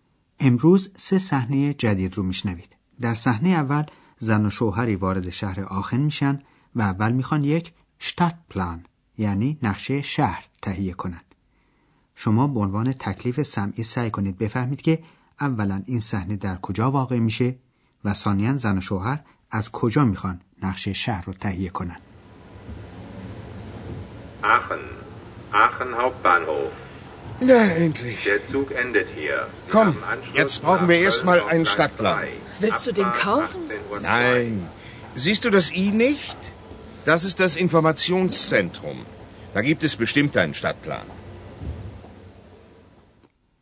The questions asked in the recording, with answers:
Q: اولا این صحنه در کجا واقع میشه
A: محل این صحنه ایستگاه راه آهن آخنه

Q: ثانیا زن و شوهر از کجا میخوان نقشه شهر رو تهیه کنن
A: در این ایستگاه هم مثل اغلب شهرهای بزرگ یک قسمت اطلاعات وجود داره که در اونجا نقشه کوچک شهر رو هم به علاقمندان میدن